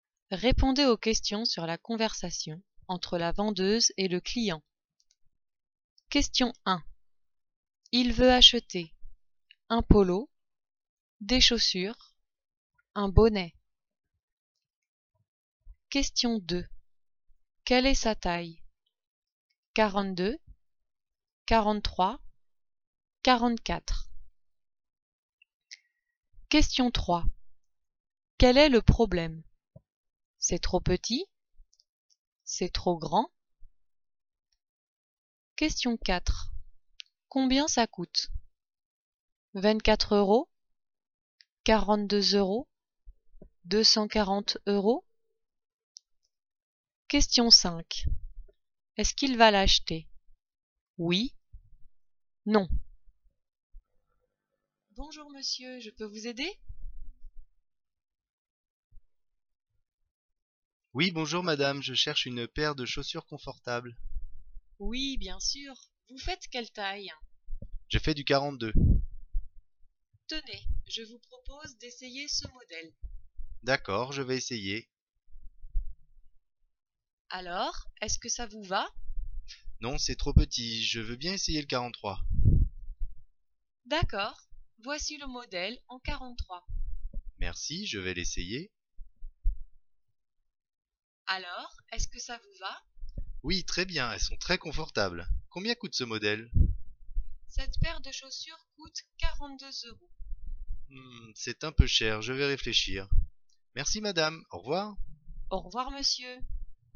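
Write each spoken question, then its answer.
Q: Il veut acheter un polo, des chaussures, un bonnet.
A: des chaussures

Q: Quel est le problème?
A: C'est trop petit

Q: Combien ça coûte?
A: 42 euros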